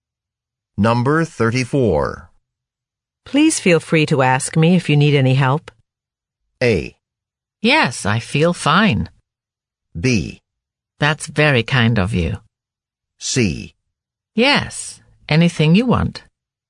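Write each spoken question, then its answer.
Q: Please feel free to ask me if you need any help.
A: B: That's very kind of you.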